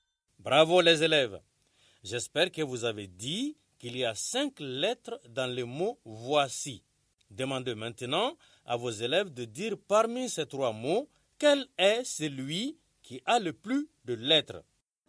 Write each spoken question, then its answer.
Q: Demandez maintenant à vos élèves de dire parmi ces trois mots, quel est celui qui a le plus de lettres.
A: j'espère que vous avez dit que c'est le mot « voici ».